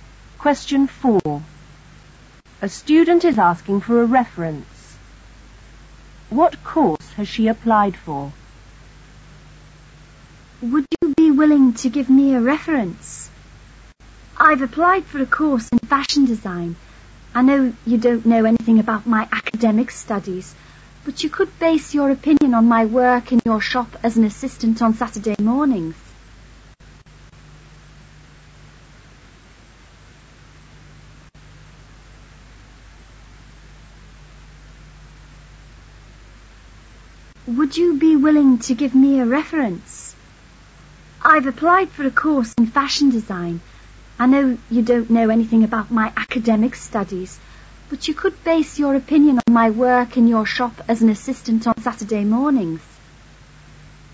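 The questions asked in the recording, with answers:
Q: What course has she applied for?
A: Fashion design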